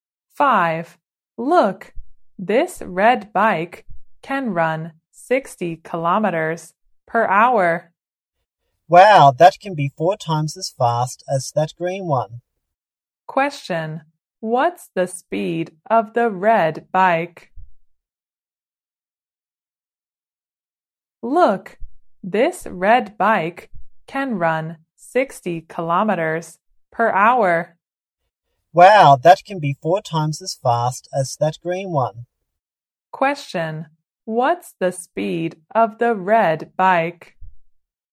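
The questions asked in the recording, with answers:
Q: What's the speed of the red bike?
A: 60 kilometers per hour.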